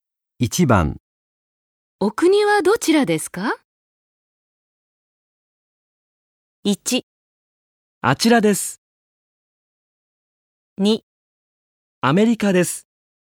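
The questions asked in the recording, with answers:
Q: お国はどちらですか?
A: 2: アメリカです。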